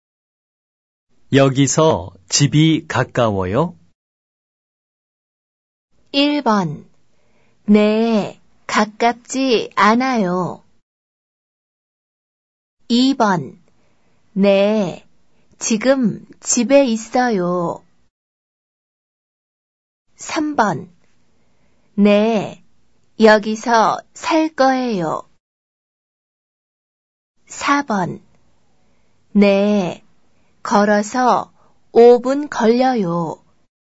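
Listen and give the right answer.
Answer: 4: 네, 걸어서 5분 걸려요.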